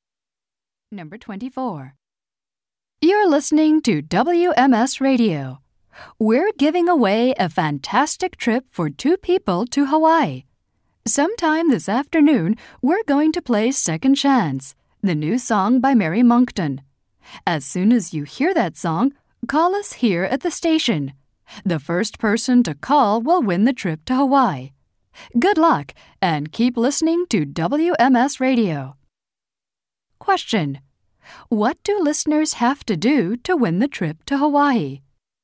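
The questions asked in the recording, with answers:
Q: What do listeners have to do to win the trip to Hawaii?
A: Be the first to call when they hear the song Second Chance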